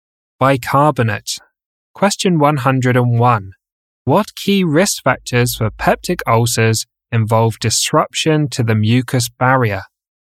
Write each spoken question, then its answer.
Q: What key risk factors for peptic ulcers involve disruption to the mucus barrier?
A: Helicobacter pylori infection and non-steroidal anti-inflammatory drugs, or NSAIDs.